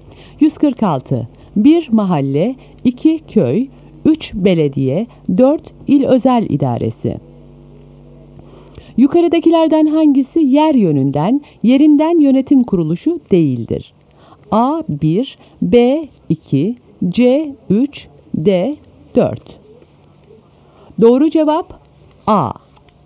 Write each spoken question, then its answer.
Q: Yukarıdakilerden hangisi yer yönünden, yerinden yönetim kuruluşu değildir?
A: Doğru cevap A.